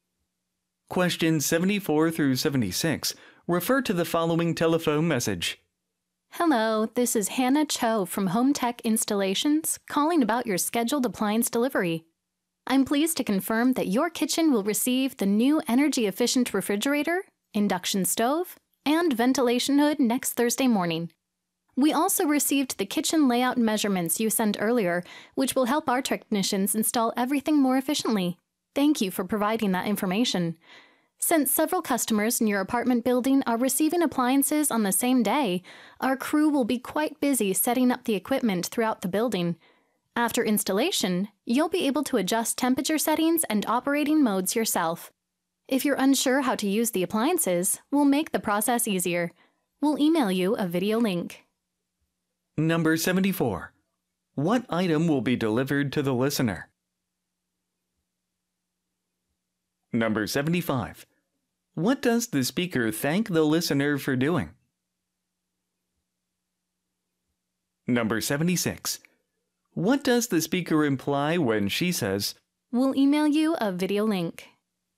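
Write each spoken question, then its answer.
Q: What item will be delivered to the listener?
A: An energy-efficient refrigerator, an induction stove and a ventilation hood

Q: What does the speaker thank the listener for doing?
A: Sending the kitchen layout measurements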